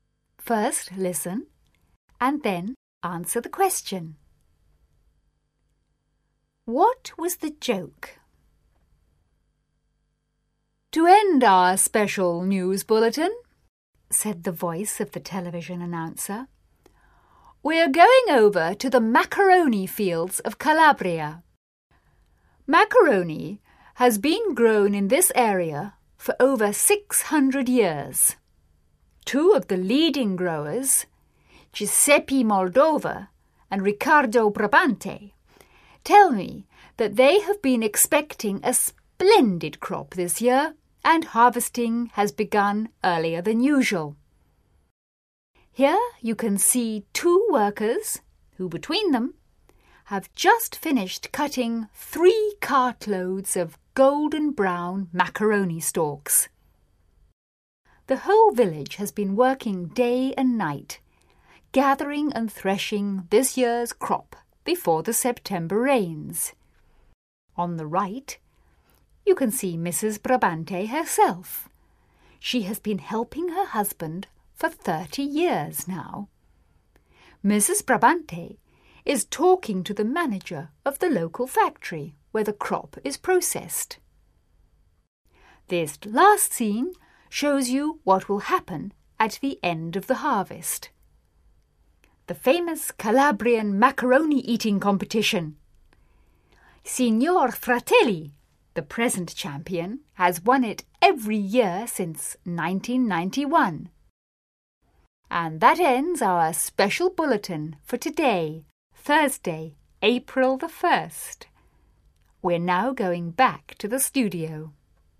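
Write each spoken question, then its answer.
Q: What was the joke?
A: The bulletin pretended macaroni grows as a crop in fields and is harvested, as an April Fool's joke.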